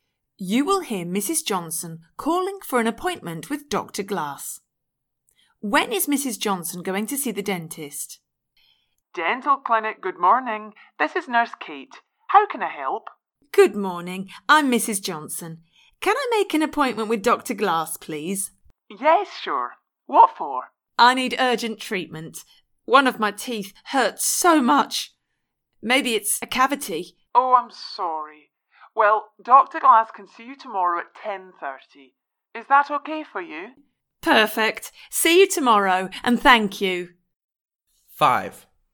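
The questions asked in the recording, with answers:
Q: When is Mrs. Johnson going to see the dentist?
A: Tomorrow at 10:30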